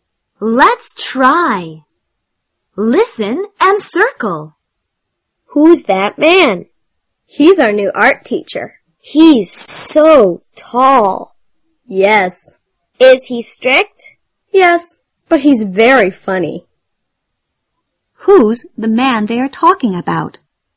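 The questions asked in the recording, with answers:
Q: Who's the man they are talking about?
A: Their new art teacher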